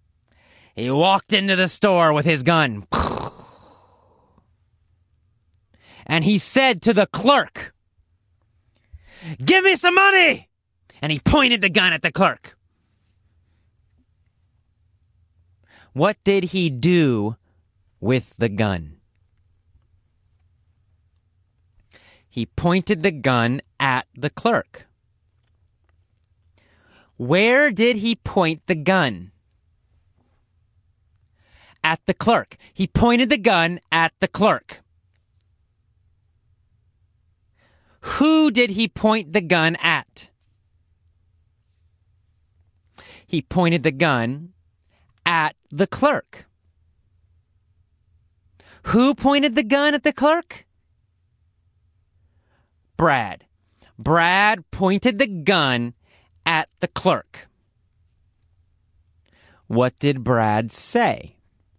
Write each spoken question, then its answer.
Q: What did Brad say?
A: He said, "Give me some money!"